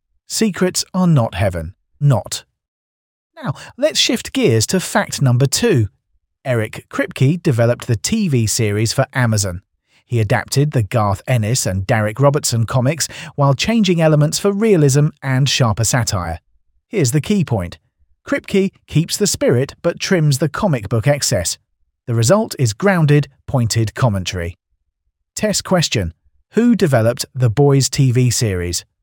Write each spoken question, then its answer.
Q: Who developed The Boys TV series?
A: Eric Kripke.